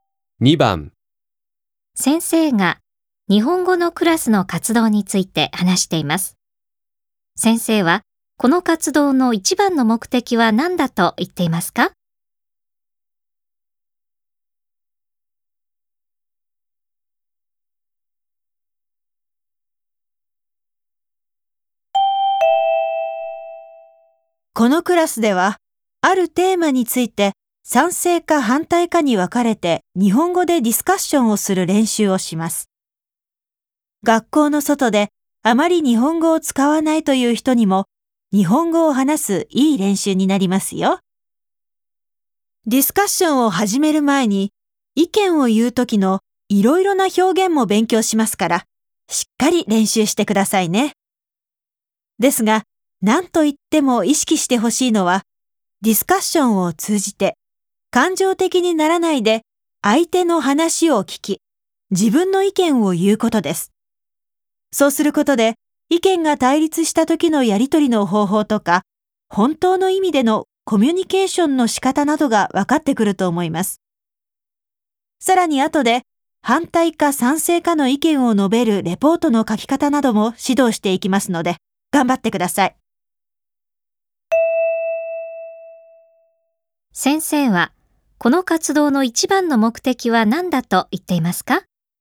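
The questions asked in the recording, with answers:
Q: 先生は、この活動の一番の目的は何だと言っていますか?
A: 感情的にならないで相手の話を聞き、自分の意見を言えるようになること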